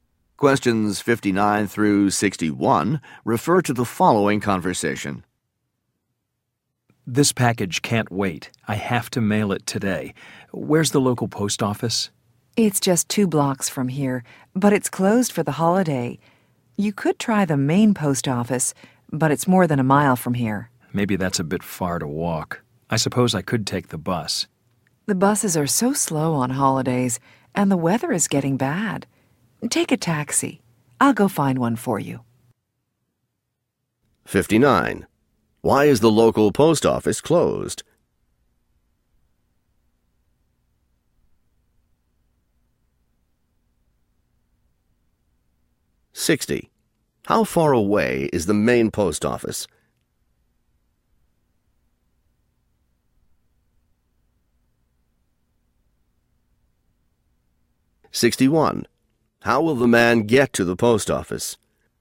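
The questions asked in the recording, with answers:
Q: Why is the local post office closed?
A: For the holiday

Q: How far away is the main post office?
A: More than a mile

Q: How will the man get to the post office?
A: By taxi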